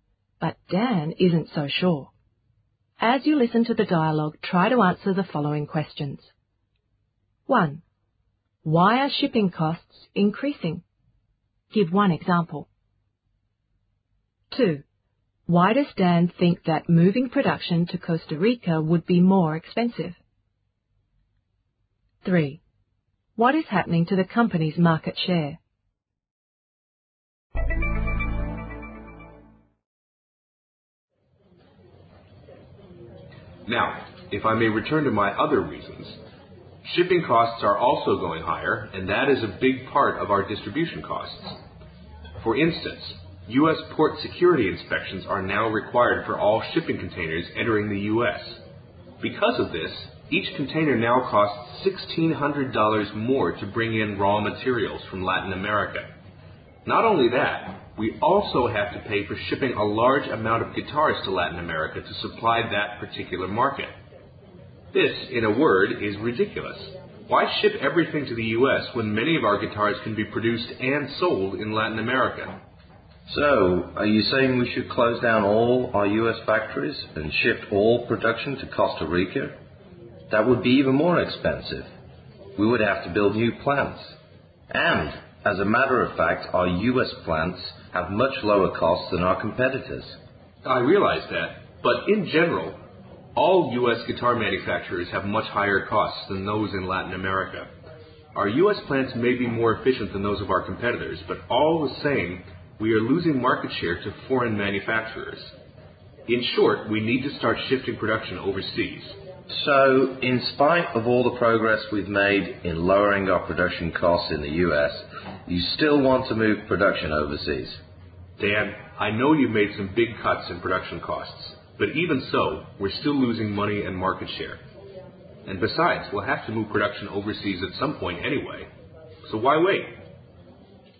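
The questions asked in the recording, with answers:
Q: Why are shipping costs increasing? Give one example.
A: U.S. port security inspections are now required for all shipping containers, adding $1,600 per container

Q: Why does Dan think that moving production to Costa Rica would be more expensive?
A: They would have to build new plants

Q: What is happening to the company's market share?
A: It is decreasing; they are losing market share to foreign manufacturers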